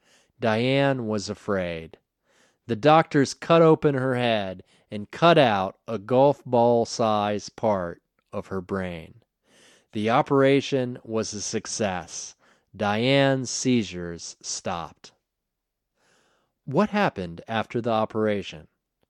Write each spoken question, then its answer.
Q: What happened after the operation?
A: After the operation, Diane's seizures stopped.